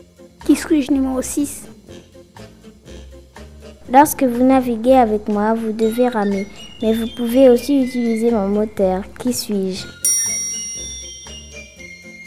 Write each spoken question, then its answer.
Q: Qui suis-je?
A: Une barque.